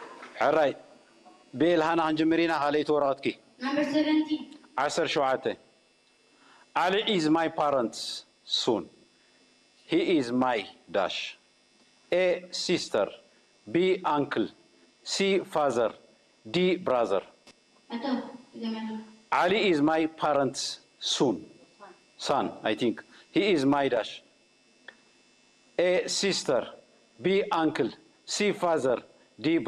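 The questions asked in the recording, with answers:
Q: Ali is my parents soon He is my dash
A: D: brother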